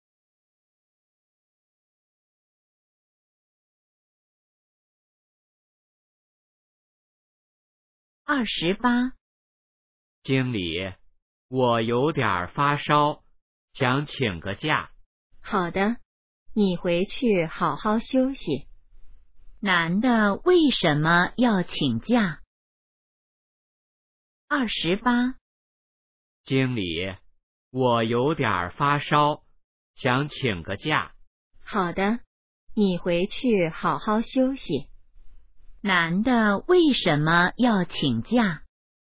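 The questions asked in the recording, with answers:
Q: 男的为什么要请假?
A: 发烧了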